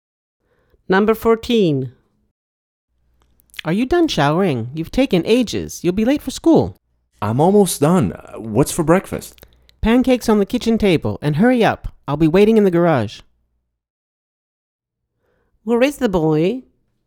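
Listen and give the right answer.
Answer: in the shower / bathroom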